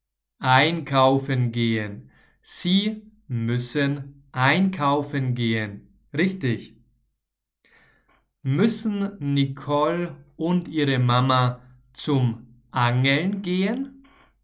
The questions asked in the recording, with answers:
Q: Müssen Nicole und ihre Mama zum Angeln gehen?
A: Nein, sie müssen nicht zum Angeln gehen.